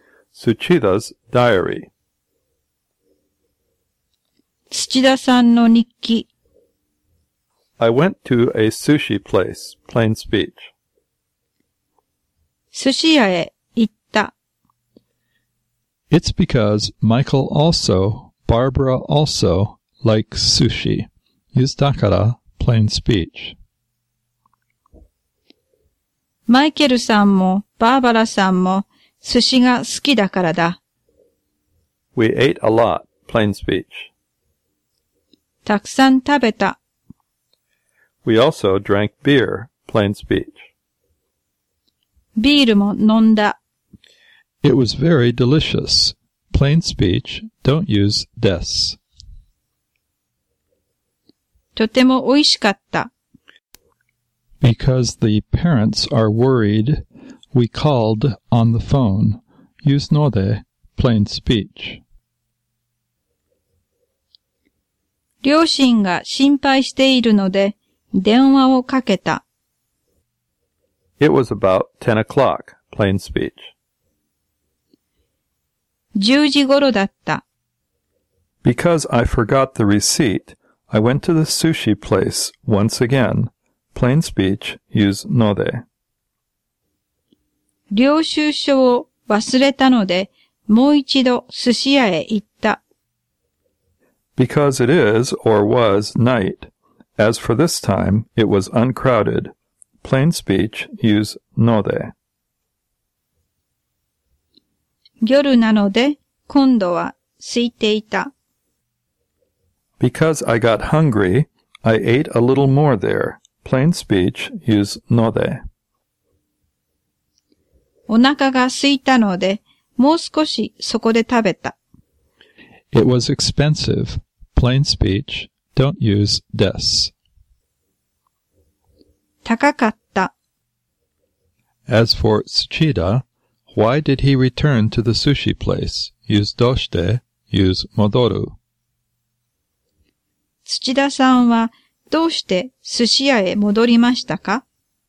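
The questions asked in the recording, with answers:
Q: 田さんはどうして寿司屋へ戻りましたか?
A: 領収書を忘れたからです。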